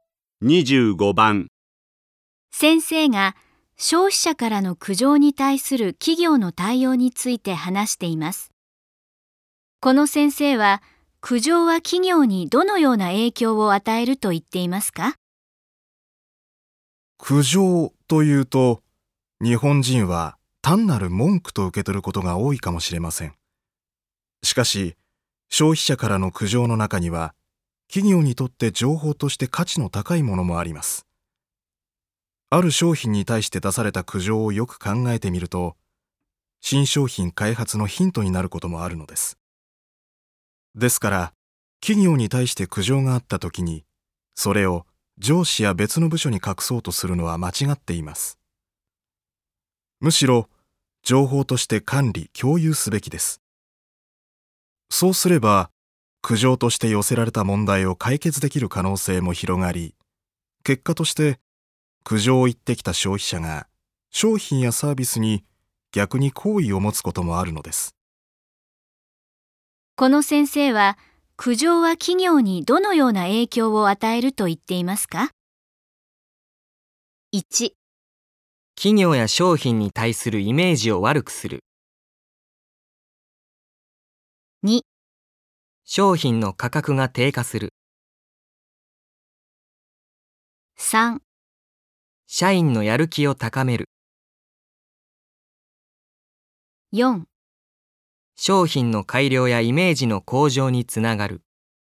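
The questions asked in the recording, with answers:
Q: この先生は苦情は企業にどのような影響を与えると言っていますか?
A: 4: 商品の改良やイメージの向上につながる。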